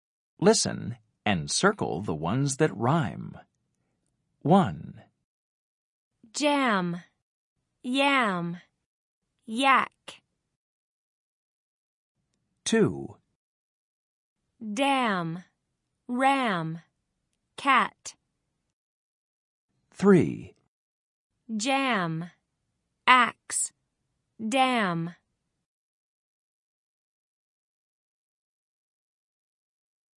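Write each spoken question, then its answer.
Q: Dam, ram, cat.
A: dam, ram

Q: Jam, axe, dam.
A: jam, dam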